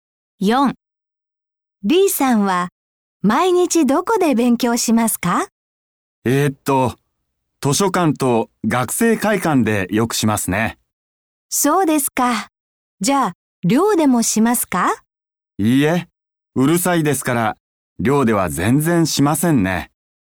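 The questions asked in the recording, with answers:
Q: Dさんは毎日どこで勉強しますか?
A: 図書館と学生会館(寮ではしない)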